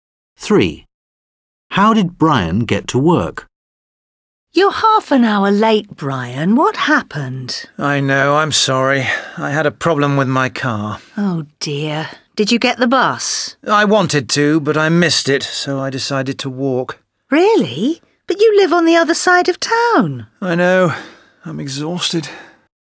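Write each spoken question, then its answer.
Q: How did Brian get to work?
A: He walked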